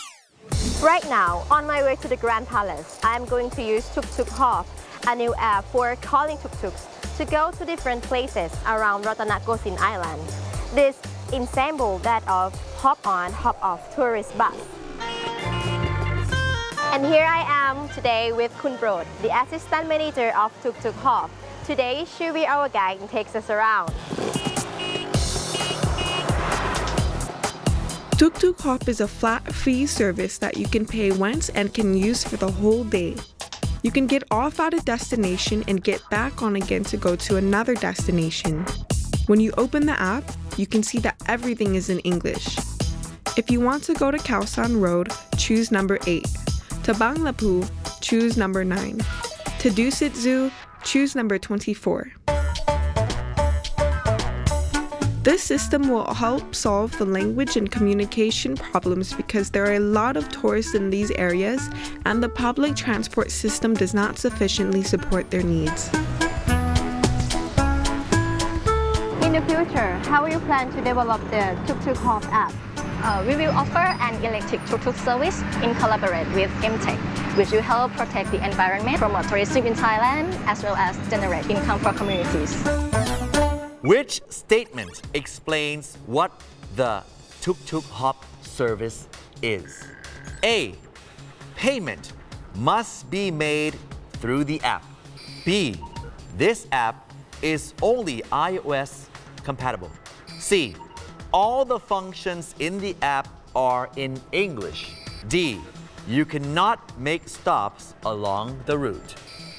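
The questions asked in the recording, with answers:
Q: Which statement explains what the Tuk Tuk Hop service is?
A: C: All the functions in the app are in English.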